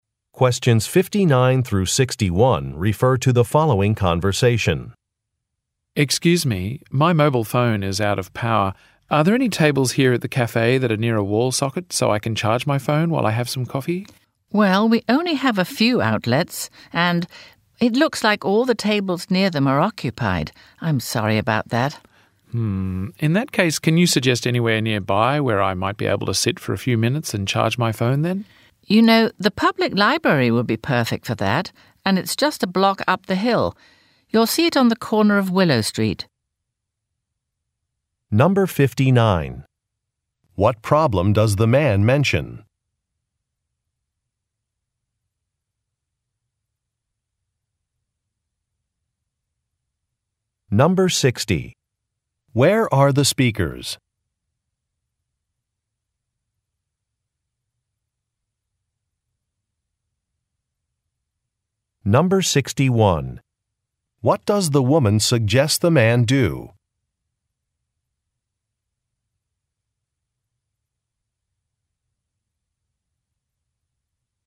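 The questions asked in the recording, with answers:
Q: What problem does the man mention?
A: His mobile phone is out of power.

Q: Where are the speakers?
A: At a cafe.

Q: What does the woman suggest the man do?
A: Go to the public library to charge his phone.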